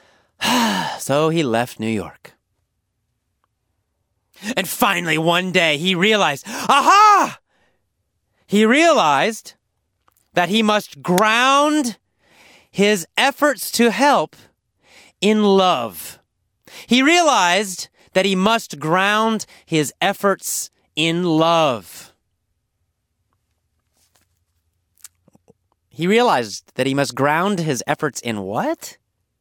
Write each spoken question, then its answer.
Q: He realized that he must ground his efforts in what?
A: In love.